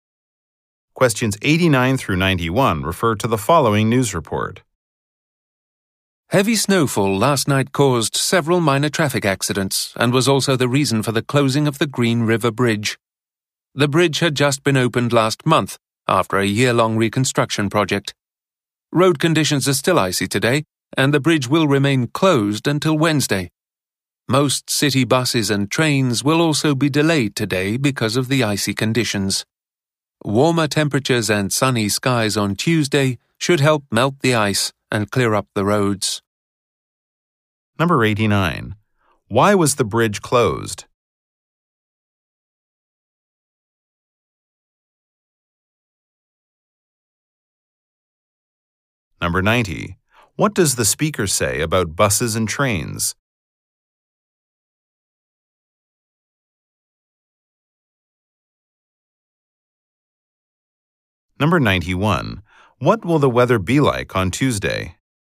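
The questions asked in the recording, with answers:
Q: Why was the bridge closed?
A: Because of heavy snow.

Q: What does the speaker say about buses and trains?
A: They will be delayed.

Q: What will the weather be like on Tuesday?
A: Warmer and sunny.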